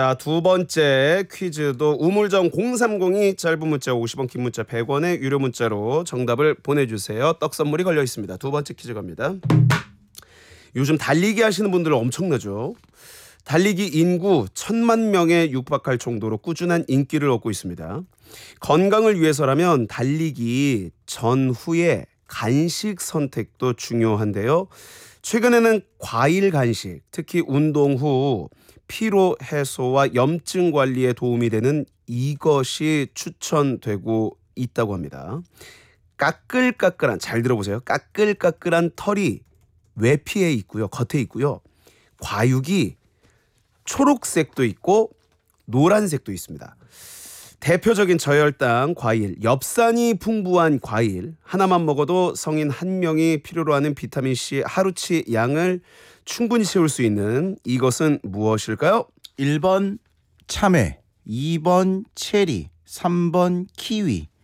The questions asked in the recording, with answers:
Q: 대표적인 저혈당 과일, 엽산이 풍부한 과일 하나만 먹어도 성인 한 명이 필요로 하는 비타민C 하루치 양을 충분히 채울 수 있는 이것은 무엇일까요?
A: 3번! 키위가 정답이었습니다.